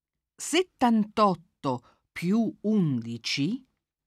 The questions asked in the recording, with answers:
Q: 78 più 11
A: fa 89.